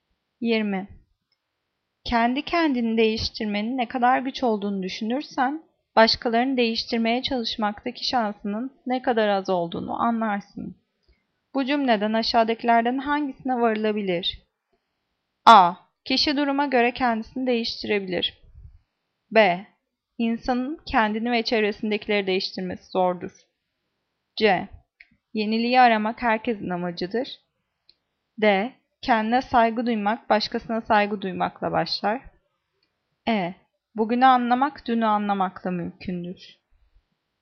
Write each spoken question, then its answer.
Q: Bu cümleden aşağıdakilerden hangisine varılabilir?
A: Cevap B. İnsanın kendini ve çevresindekileri değiştirmesi zordur.